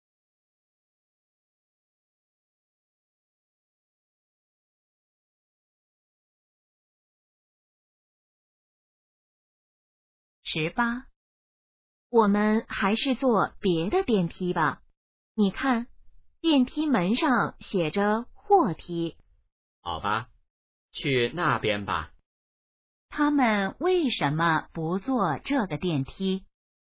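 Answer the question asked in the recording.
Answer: 那是货梯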